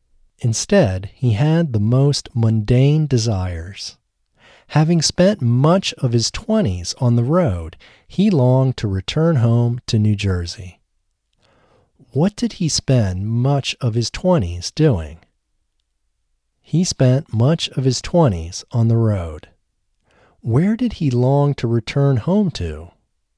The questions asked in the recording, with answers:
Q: Where did he long to return home to?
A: He longed to return home to New Jersey.